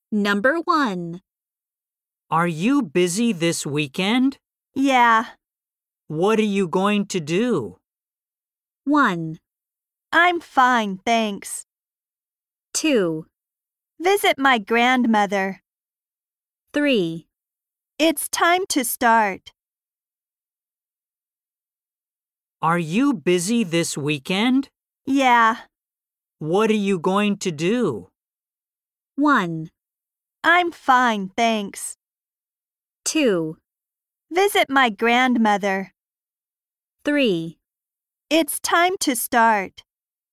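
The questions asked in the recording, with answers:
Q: What are you going to do?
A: 2: Visit my grandmother.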